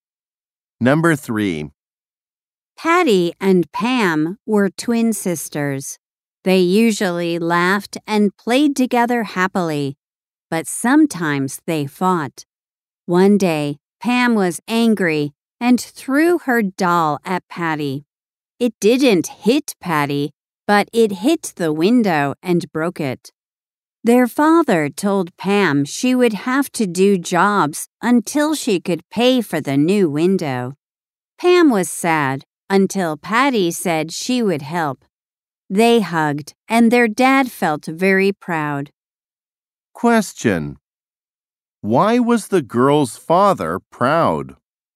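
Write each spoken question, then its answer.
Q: Why was the girl's father proud?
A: Patty said she would help Pam.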